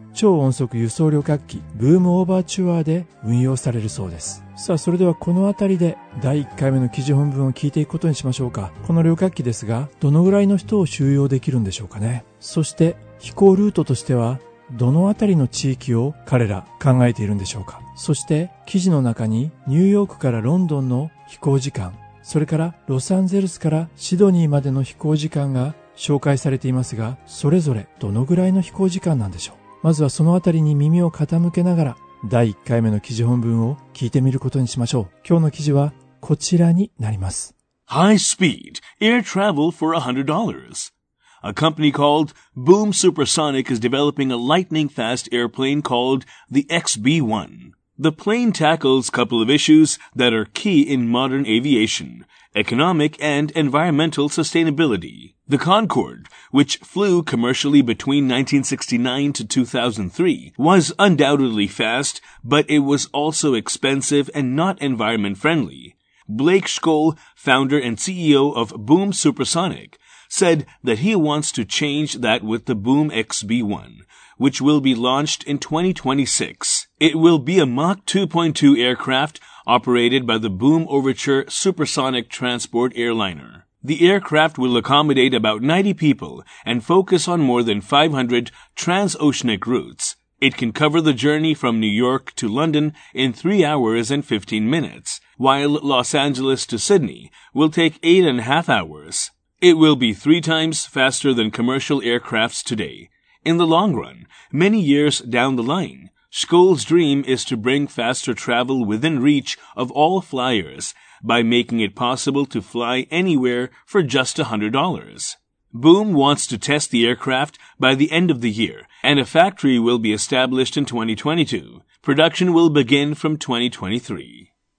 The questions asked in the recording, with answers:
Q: この旅客機ですが、どのぐらいの人を収容できるんでしょうかね。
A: The aircraft will accommodate about 90 people.

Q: そして飛行ルートとしてはどのあたりの地域を彼ら考えているんでしょうか。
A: And focus on more than 500 transoceanic routes.

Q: そして記事の中にニューヨークからロンドンの飛行時間、それからロサンゼルスからシドニーまでの飛行時間が紹介されていますが、それぞれどのぐらいの飛行時間なんでしょう。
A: It can cover the journey from New York to London in 3 hours and 15 minutes.